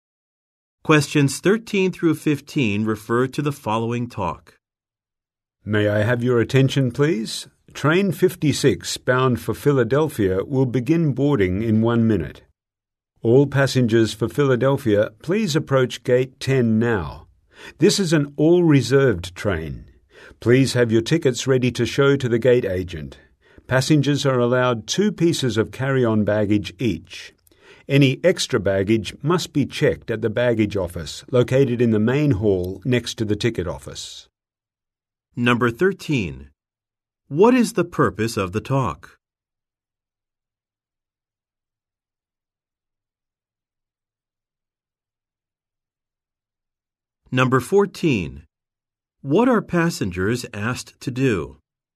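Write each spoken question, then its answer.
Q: What is the purpose of the talk?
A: To announce boarding of a train to Philadelphia

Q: What are passengers asked to do?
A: Go to gate 10 and have tickets ready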